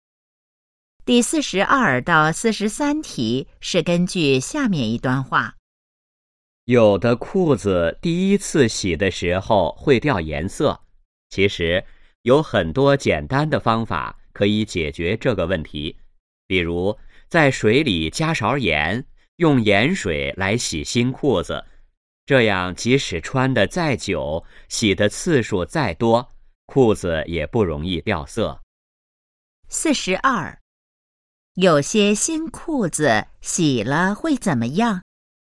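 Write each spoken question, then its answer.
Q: 有些新裤子洗了会怎么样?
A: 会掉颜色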